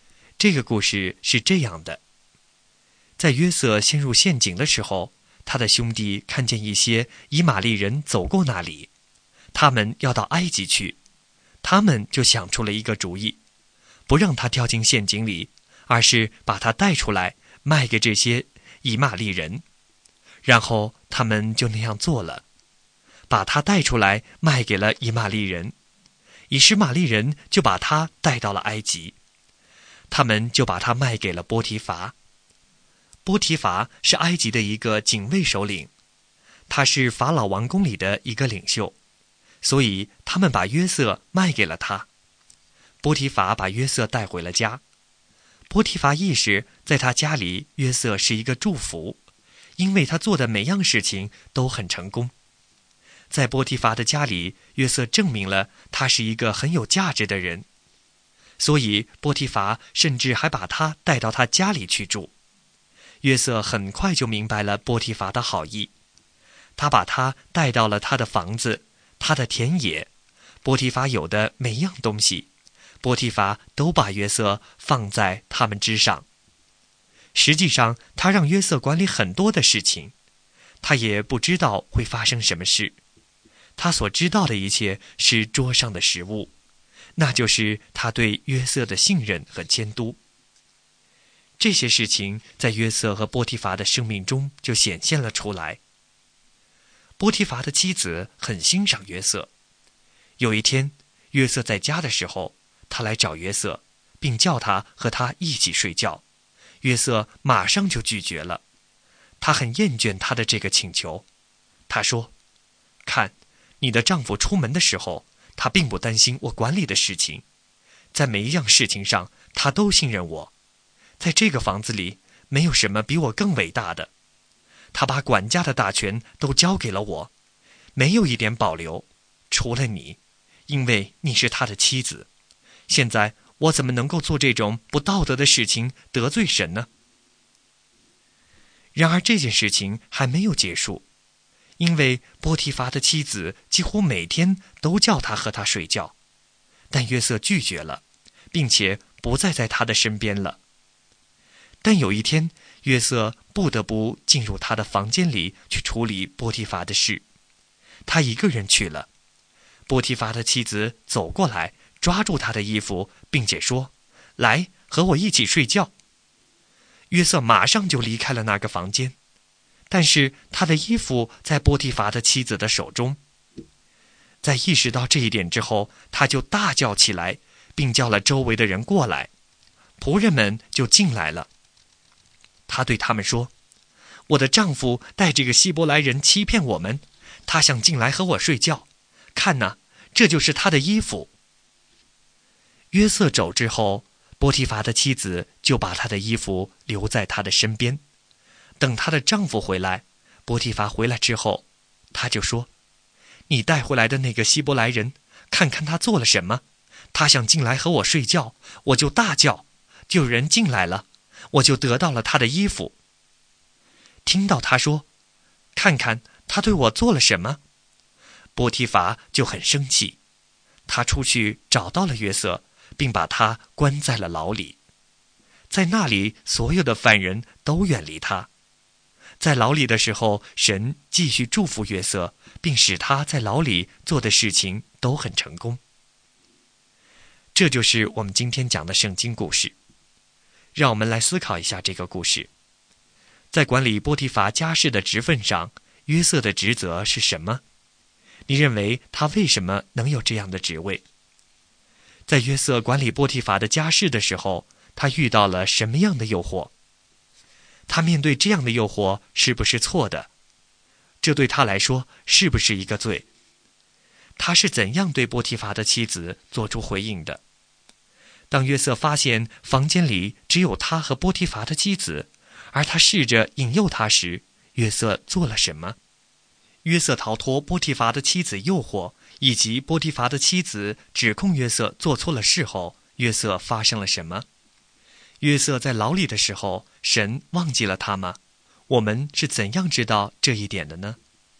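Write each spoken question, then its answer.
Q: 在管理波提乏家事的职分上,约瑟的职责是什么?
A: 管理波提乏的房子、田野和他所有的一切

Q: 在约瑟管理波提乏的家事的时候,他遇到了什么样的诱惑?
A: 波提乏的妻子叫他和她一起睡觉

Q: 他是怎样对波提乏的妻子做出回应的?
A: 他马上拒绝了,说不能做这种不道德的事得罪神

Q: 当约瑟发现房间里只有他和波提乏的妻子,而他试着引诱他时,约瑟做了什么?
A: 他马上离开了房间,衣服留在了她手中

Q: 约瑟逃脱波提乏的妻子诱惑,以及波提乏的妻子指控约瑟做错了事后,约瑟发生了什么?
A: 波提乏很生气,把他关进了牢里

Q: 约瑟在牢里的时候,神忘记了他吗?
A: 没有,神继续祝福他,使他在牢里做的事都很成功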